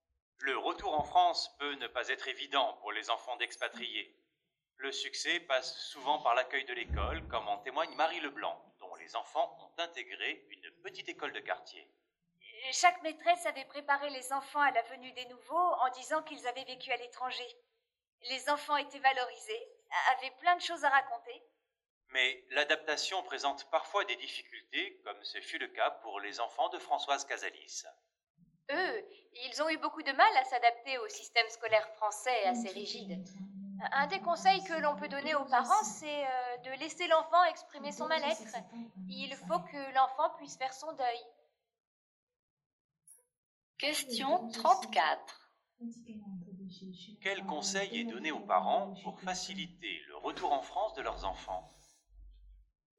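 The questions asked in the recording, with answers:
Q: Quel conseil est donné aux parents pour faciliter le retour en France de leurs enfants ?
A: Laisser l'enfant exprimer son mal-être.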